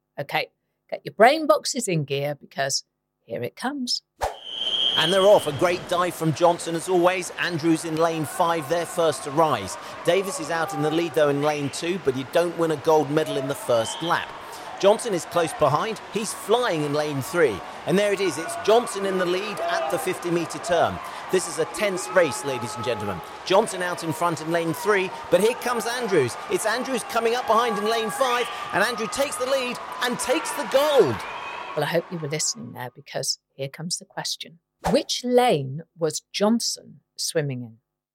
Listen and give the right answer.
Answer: And the answer was lane 3.